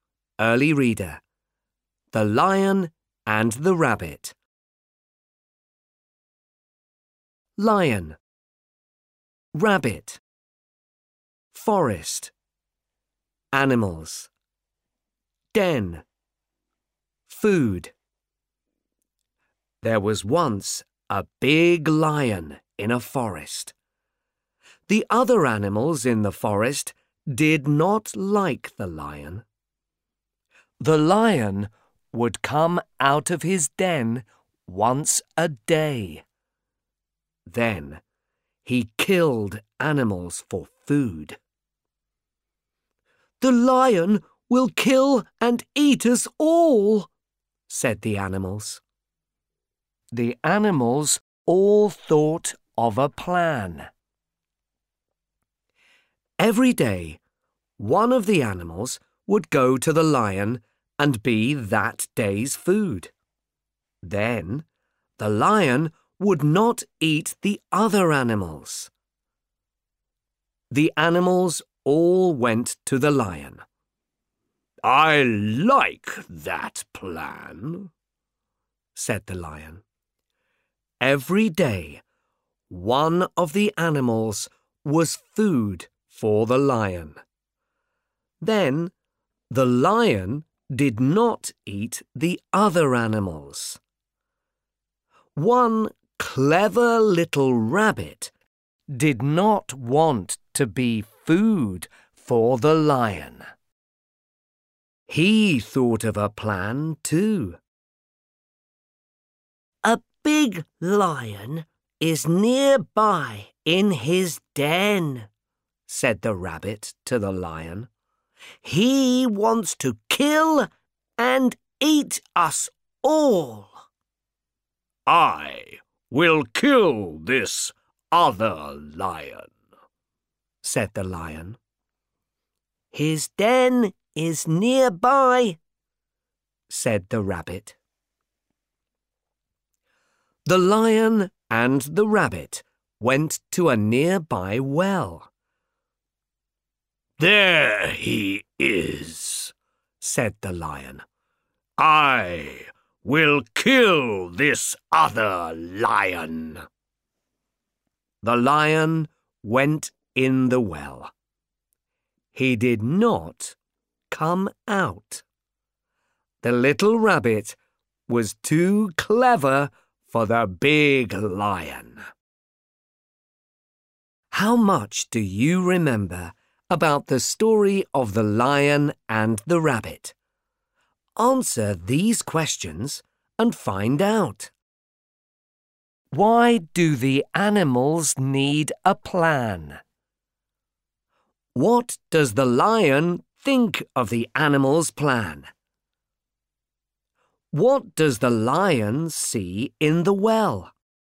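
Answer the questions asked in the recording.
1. Because the lion would kill and eat them all
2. He likes it
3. Another lion (his own reflection)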